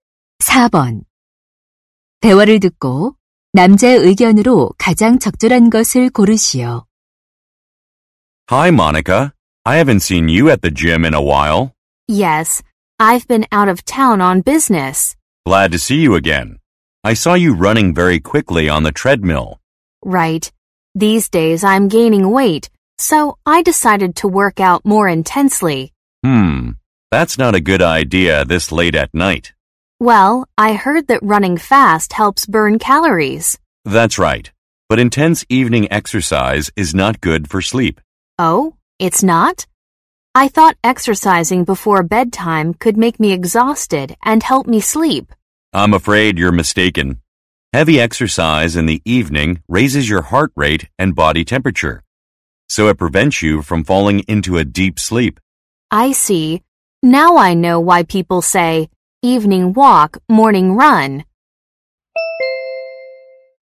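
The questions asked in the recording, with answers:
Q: 대화를 듣고 남자의 의견으로 가장 적절한 것을 고르시오.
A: 저녁의 격렬한 운동은 숙면에 방해가 된다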